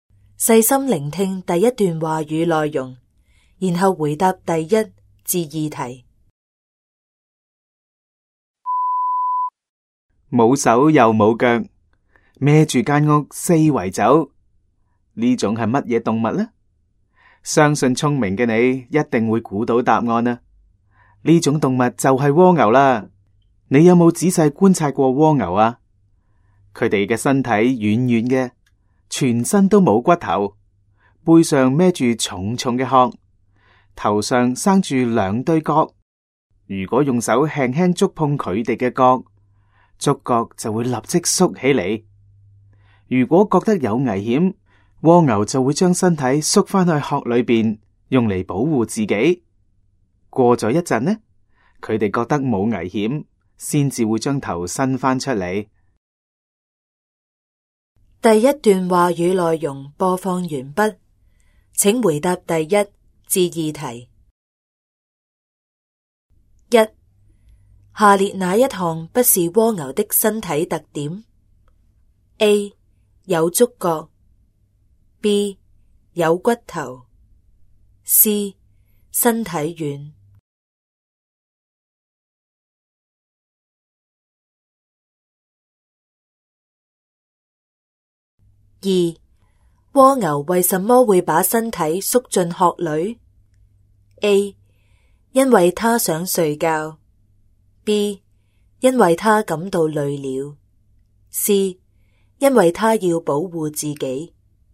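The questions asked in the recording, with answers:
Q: 下列哪一项不是蜗牛的身体特点? A. 有触角, B. 有骨头, C. 身体软。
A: B: 有骨头

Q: 蜗牛为什么会把身体缩进壳里? A. 因为它想睡觉,B. 因为他感到累了, C. 因为他要保护自己。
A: C: 因为他要保护自己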